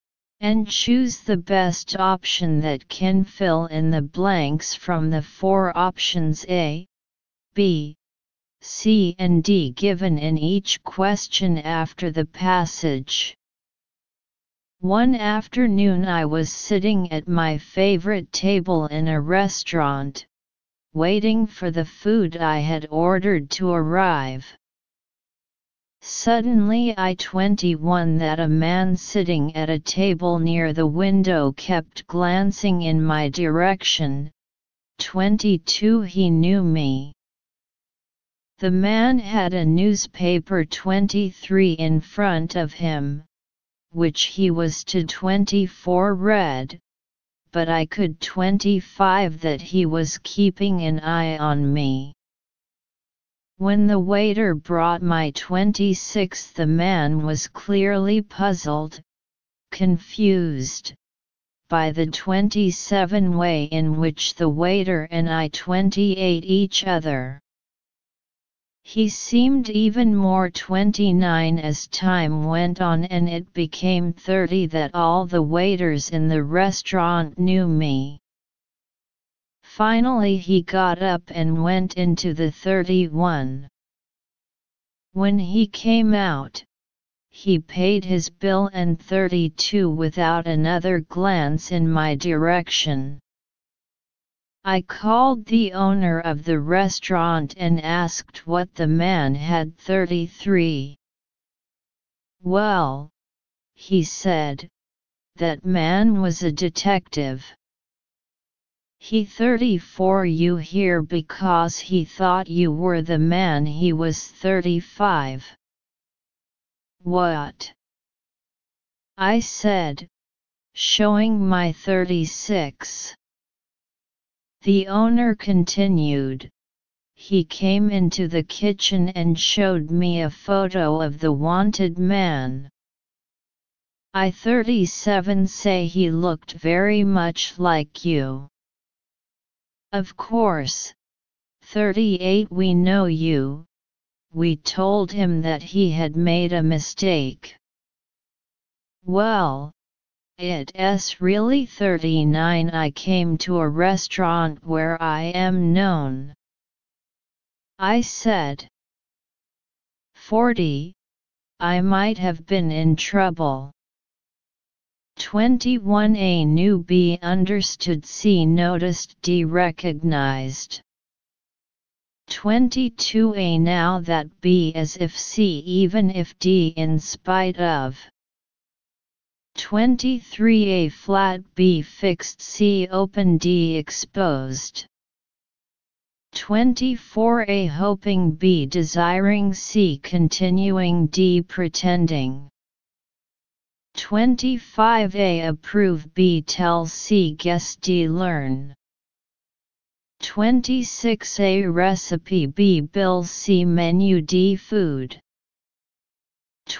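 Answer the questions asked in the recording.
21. C: noticed
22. B: as if
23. C: open
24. D: pretending
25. B: tell
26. D: food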